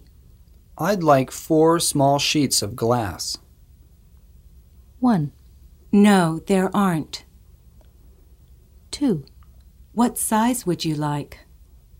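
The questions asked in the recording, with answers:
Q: I'd like 4 small sheets of glass.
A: 2: What size would you like?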